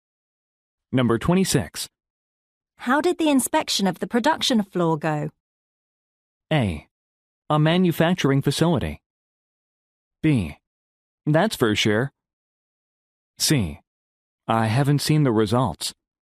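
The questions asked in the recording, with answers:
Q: How did the inspection of the production floor go?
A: C: I haven't seen the results.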